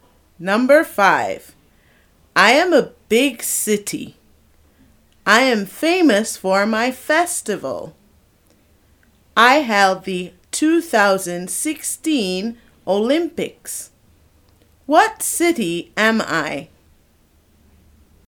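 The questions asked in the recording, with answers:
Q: What city am I?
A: Rio de Janeiro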